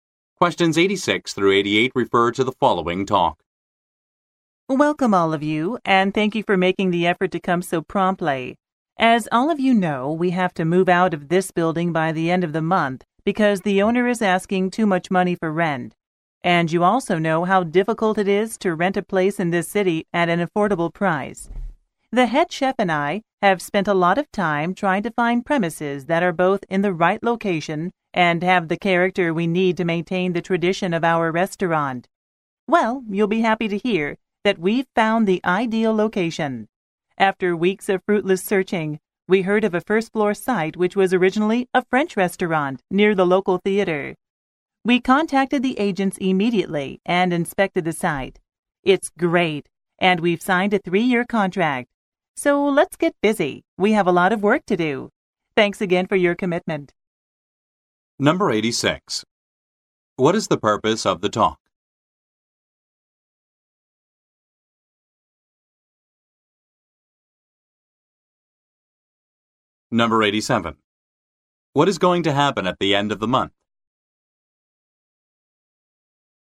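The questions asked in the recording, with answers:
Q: What is the purpose of the talk?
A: To announce that a new location for the restaurant has been found

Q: What is going to happen at the end of the month?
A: They will move out of the building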